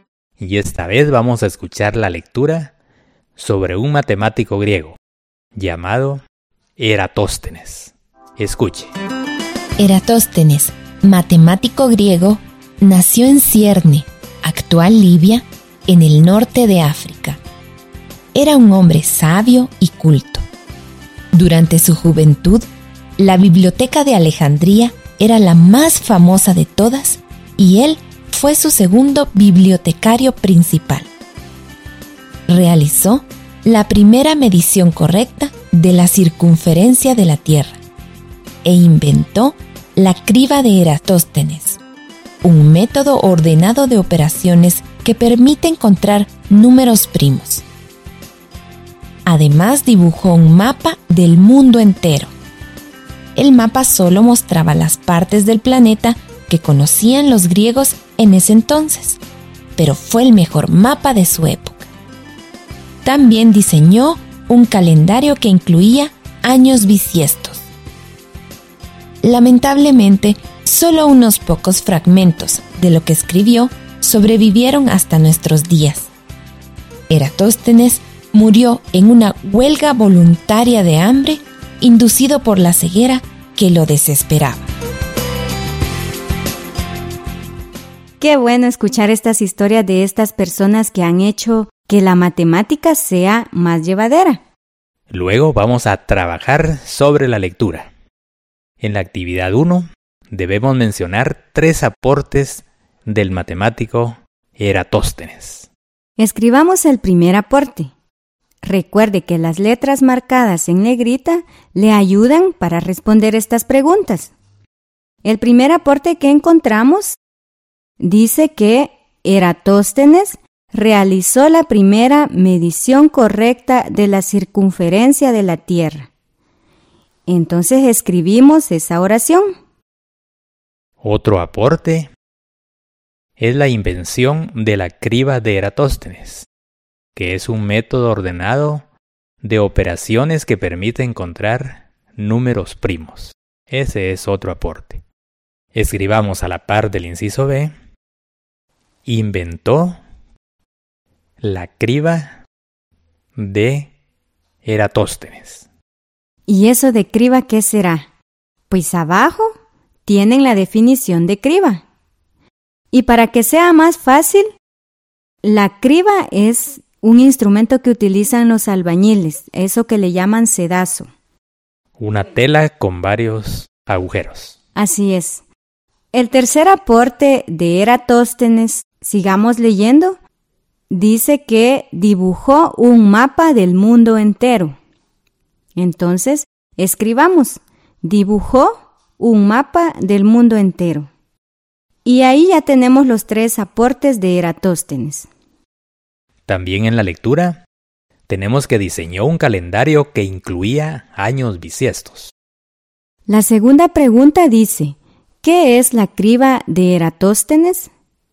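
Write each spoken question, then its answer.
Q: ¿qué es la criba de Eratóstenes?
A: Un método ordenado de operaciones que permite encontrar números primos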